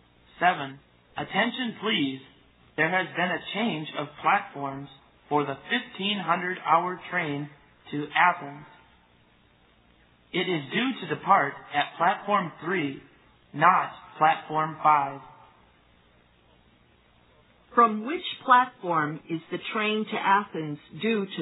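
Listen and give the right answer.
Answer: Platform 3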